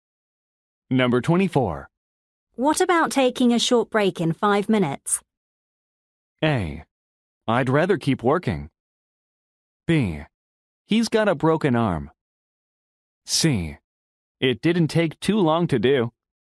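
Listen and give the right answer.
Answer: A: I'd rather keep working.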